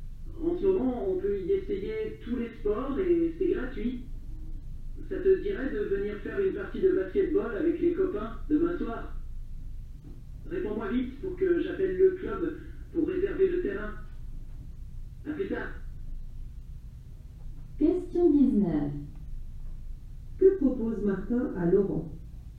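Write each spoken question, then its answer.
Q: Que propose Martin à l'heure?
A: De venir faire une partie de basketball avec les copains demain soir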